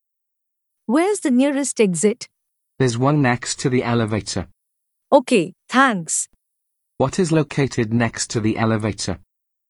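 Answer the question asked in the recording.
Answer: An exit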